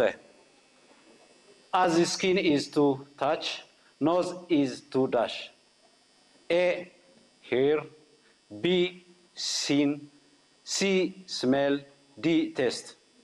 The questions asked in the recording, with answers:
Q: As his skin is to touch, nose is to dash.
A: C, smell.